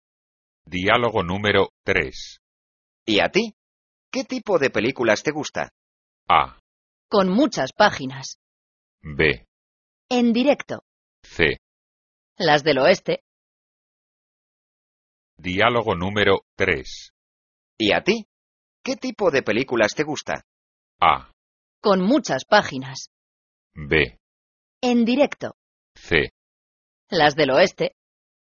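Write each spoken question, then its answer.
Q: ¿Y a ti? ¿Qué tipo de películas te gusta?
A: C: Las del oeste.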